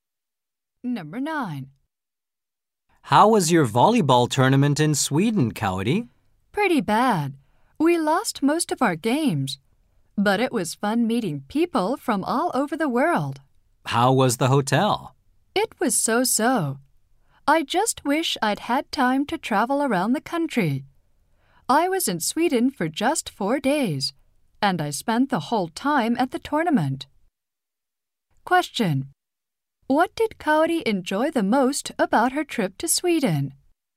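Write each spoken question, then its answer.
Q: What did Kaori enjoy the most about her trip to Sweden?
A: Meeting people from all over the world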